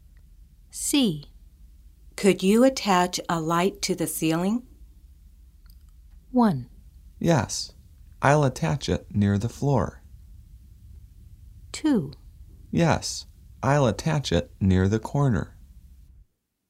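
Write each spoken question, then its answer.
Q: Could you attach a light to the ceiling?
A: 2: Yes. I'll attach it near the corner.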